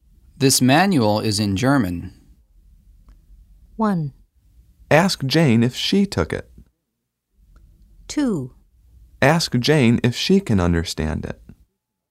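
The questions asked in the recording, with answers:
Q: This manual is in German.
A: 2: Ask Jane if she can understand it.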